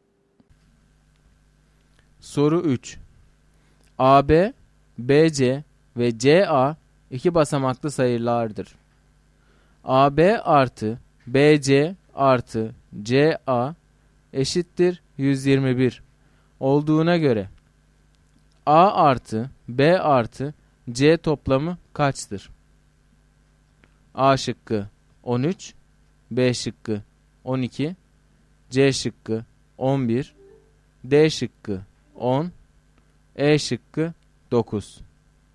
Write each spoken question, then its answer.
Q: AB artı BC artı CA eşittir 121 olduğuna göre A artı B artı C toplamı kaçtır?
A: Doğru cevap C şıkkı.